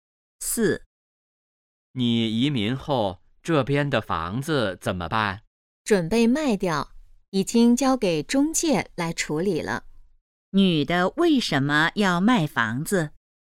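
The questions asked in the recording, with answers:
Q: 女的为什么要卖房子?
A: 她要移民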